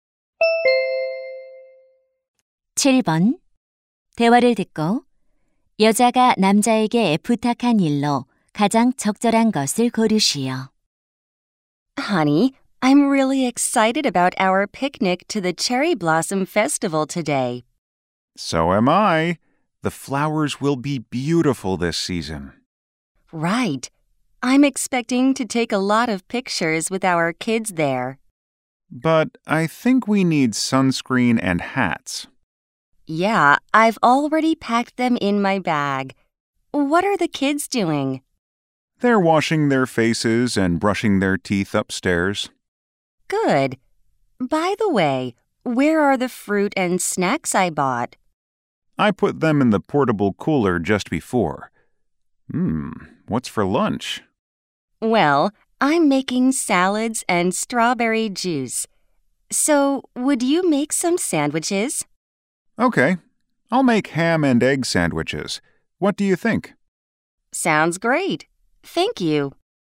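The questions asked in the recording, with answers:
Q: 대화를 듣고 여자가 남자에게 부탁한 일로 가장 적절한 것을 고르시오.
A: 샌드위치 만들기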